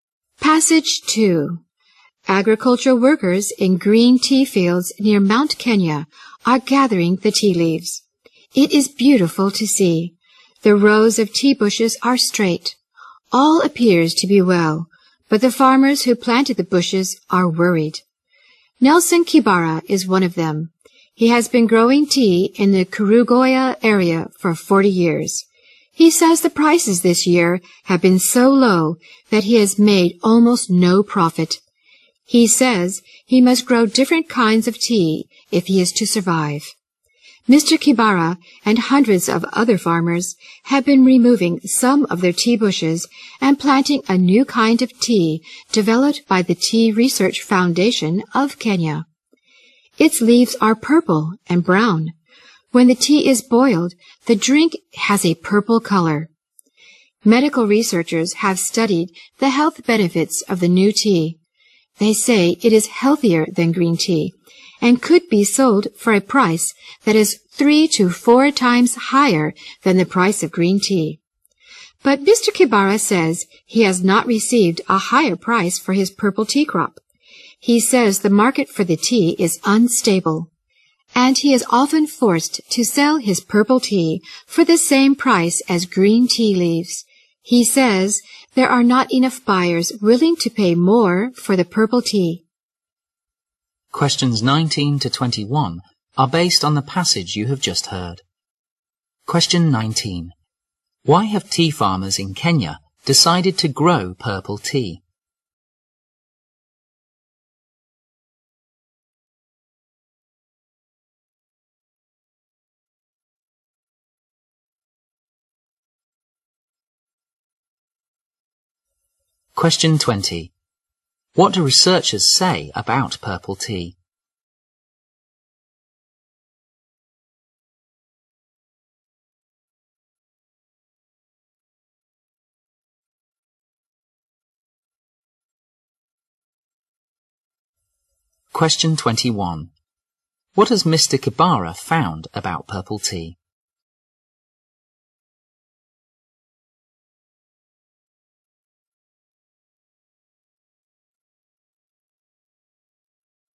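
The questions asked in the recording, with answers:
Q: Why have tea farmers in Kenya decided to grow purple tea?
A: Green tea prices were too low to make a profit

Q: What do researchers say about purple tea?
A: It is healthier than green tea and could sell for 3 to 4 times the price

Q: What has Mr. Kibara found about purple tea?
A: Its market is unstable; he often sells it at green tea prices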